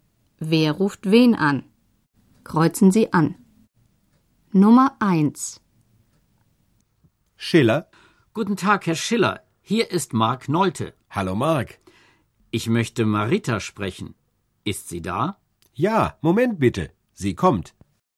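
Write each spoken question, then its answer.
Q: Wer ruft wen an?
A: Mark Nolte ruft Marita (bei Familie Schiller) an.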